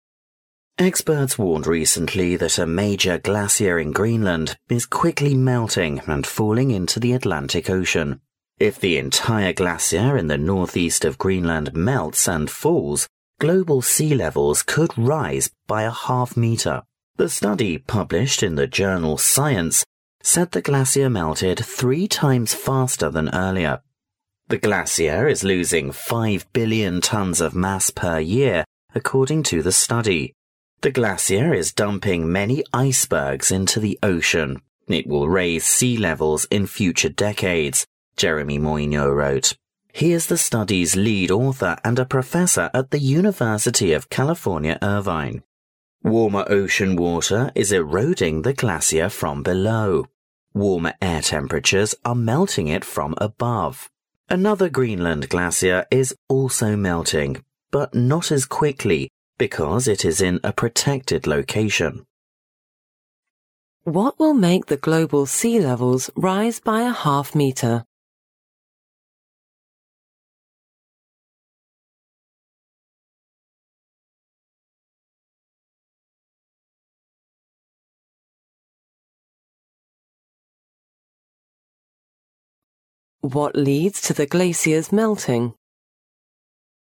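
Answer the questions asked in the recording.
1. The entire glacier in northeast Greenland melting and falling
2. Warmer ocean water eroding it from below and warmer air melting it from above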